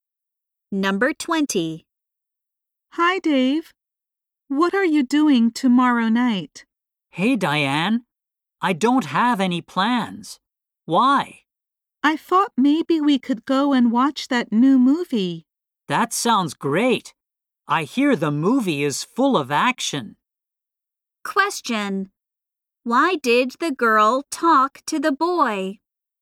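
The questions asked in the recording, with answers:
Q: Why did the girl talk to the boy?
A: To invite him to see a new movie tomorrow night.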